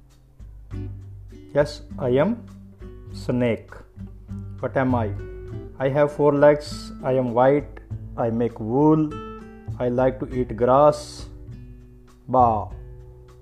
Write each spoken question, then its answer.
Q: What am I?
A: I am a sheep.